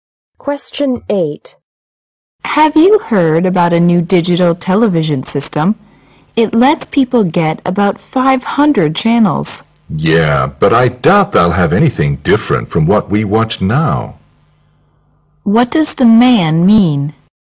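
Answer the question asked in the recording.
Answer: The new channels won't offer anything different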